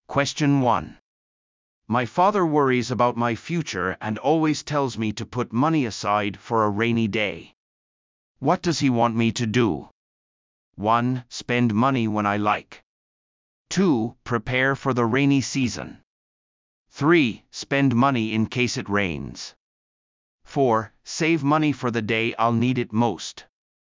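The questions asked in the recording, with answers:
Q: What does he want me to do?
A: 4: Save money for the day I'll need it most.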